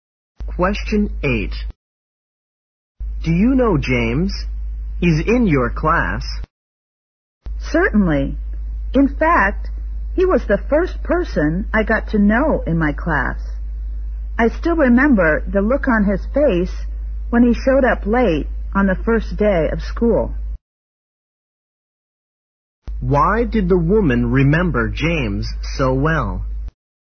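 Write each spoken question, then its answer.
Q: Why did the woman remember James so well?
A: He showed up late on the first day of school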